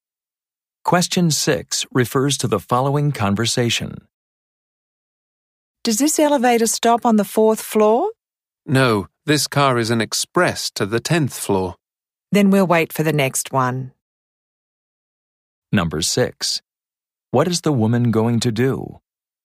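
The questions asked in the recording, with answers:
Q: What is the woman going to do?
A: Wait for the next elevator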